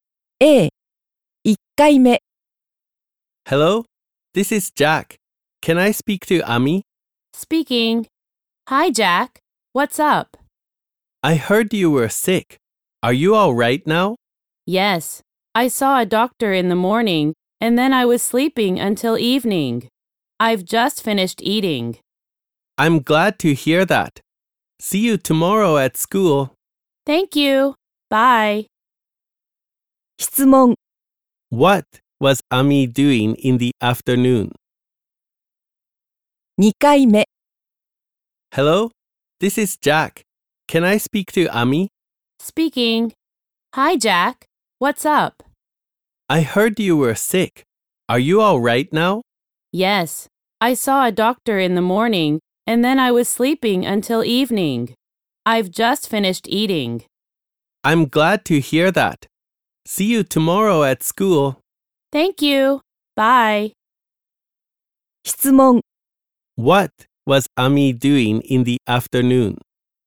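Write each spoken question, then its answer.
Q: What was Ami doing in the afternoon?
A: She was sleeping.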